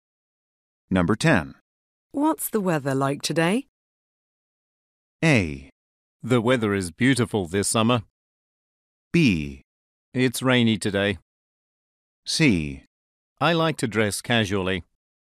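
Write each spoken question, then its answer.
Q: What's the weather like today?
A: B: It's rainy today.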